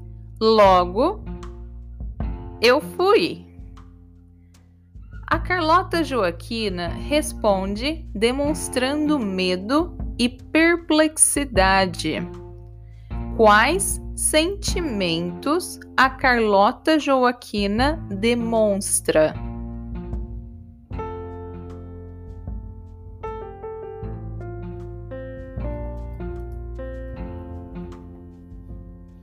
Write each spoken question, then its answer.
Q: Quais sentimentos a Carlota Joaquina demonstra?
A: medo e perplexidade. A Carlota Joaquina demonstra medo e perplexidade.